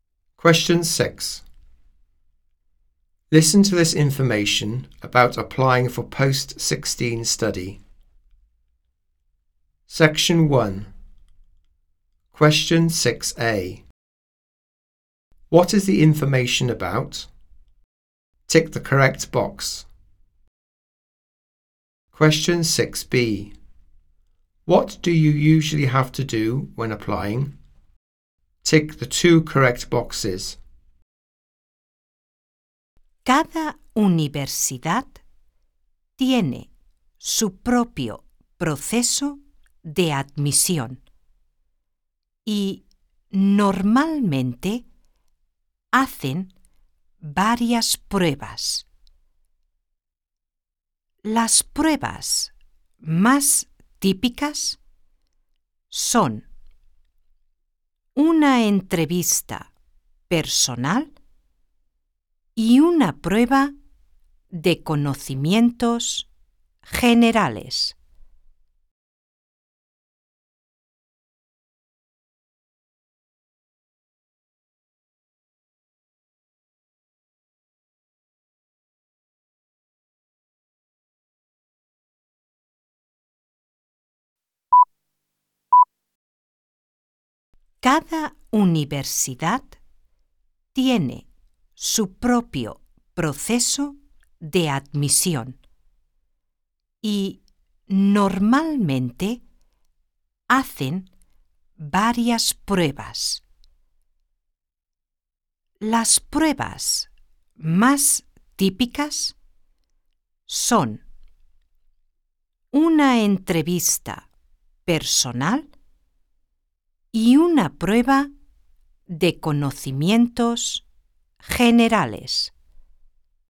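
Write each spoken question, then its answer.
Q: What is the information about?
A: University admission processes

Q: What do you usually have to do when applying?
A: A personal interview and a general knowledge test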